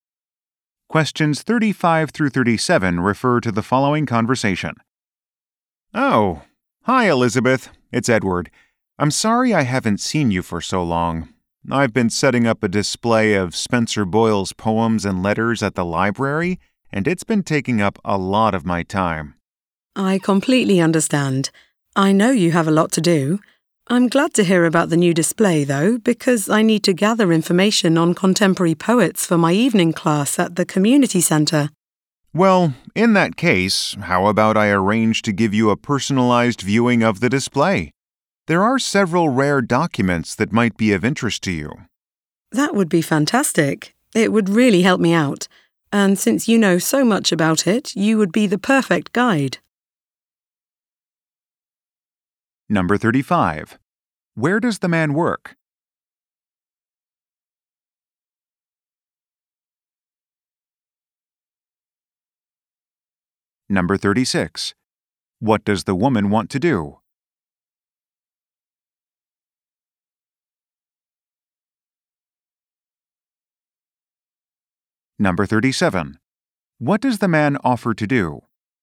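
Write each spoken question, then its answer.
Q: Where does the man work?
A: At a library

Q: What does the woman want to do?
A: Gather information on contemporary poets for her class

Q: What does the man offer to do?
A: Give her a personalized viewing of the display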